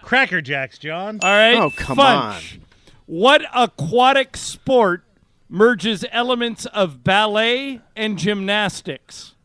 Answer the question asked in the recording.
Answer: Oh, synchronized swimming.